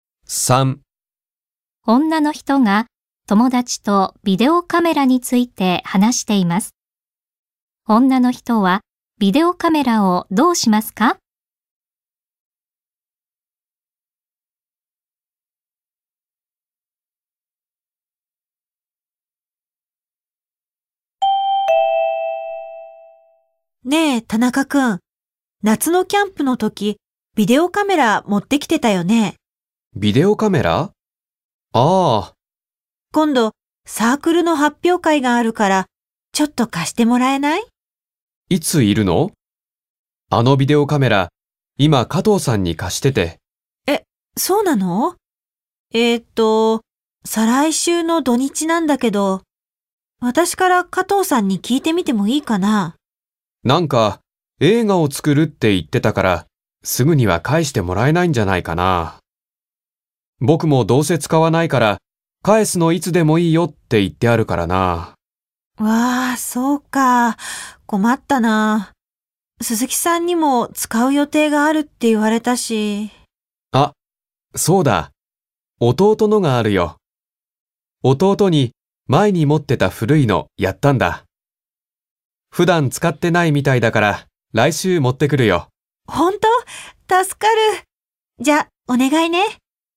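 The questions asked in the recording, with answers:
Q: 女の人はビデオカメラをどうしますか?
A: 田中くんの弟のビデオカメラを借りる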